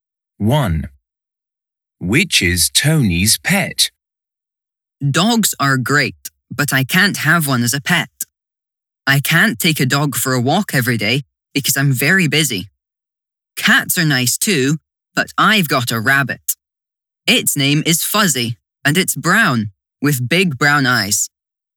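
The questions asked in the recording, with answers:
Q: Which is Tony's pet?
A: a rabbit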